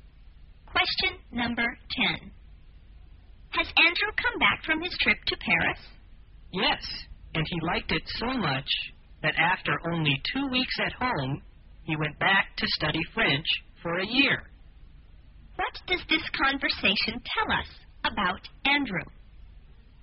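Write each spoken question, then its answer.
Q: What does this conversation tell us about Andrew?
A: He is now in Paris, studying French for a year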